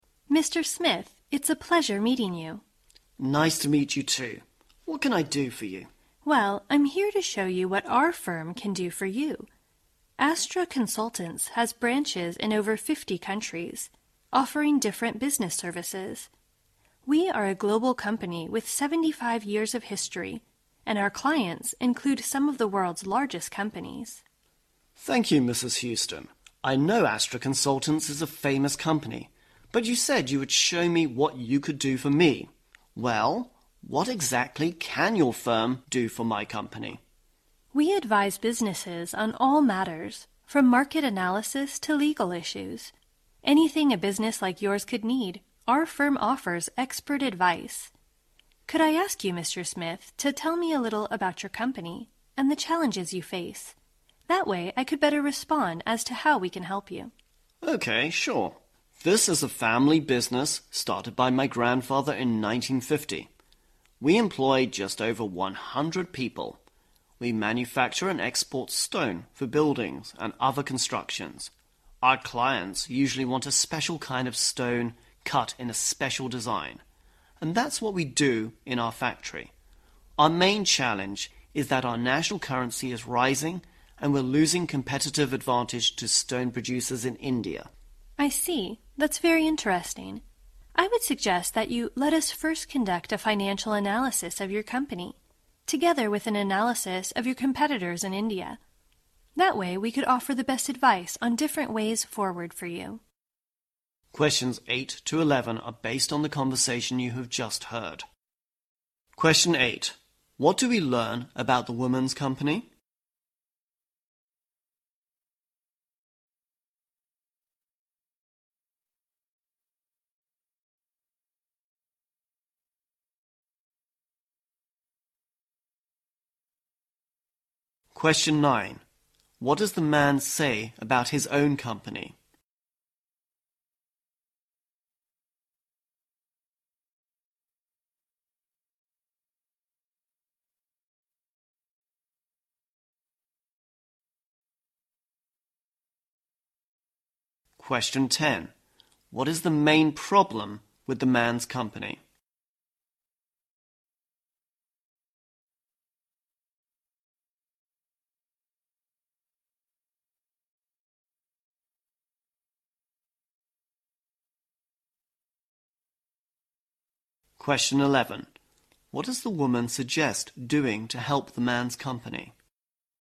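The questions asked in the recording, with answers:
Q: What do we learn about the woman's company?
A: It is a global company with 75 years of history and branches in over 50 countries.

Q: What does the man say about his own company?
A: It is a family business started by his grandfather in 1950.

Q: What is the main problem with the man's company?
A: The rising national currency is costing it its competitive advantage over stone producers in India.

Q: What does the woman suggest doing to help the man's company?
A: Conduct a financial analysis of his company and an analysis of his competitors in India.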